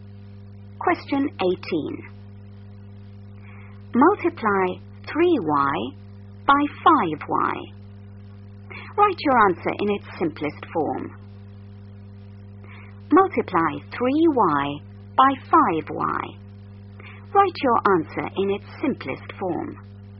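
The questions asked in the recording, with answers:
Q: Multiply 3y by 5y.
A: 15y2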